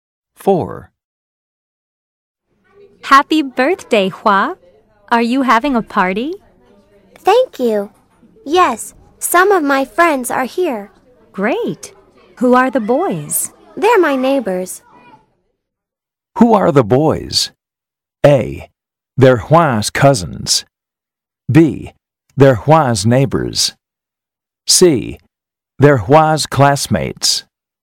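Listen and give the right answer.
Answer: B: They're Hua's neighbors.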